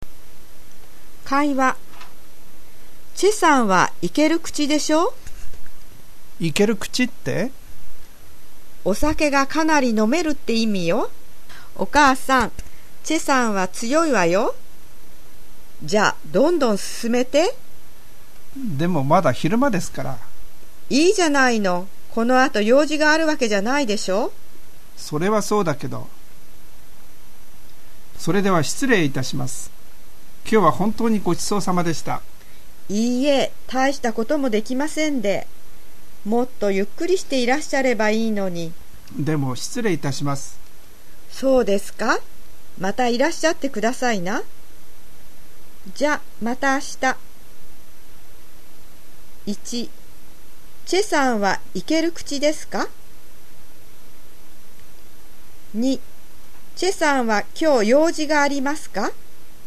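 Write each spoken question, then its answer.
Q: チェさんはイケる口ですか?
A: はい、お酒がかなり飲めます。

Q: チェさんは今日用事がありますか?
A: いいえ、この後用事はありません。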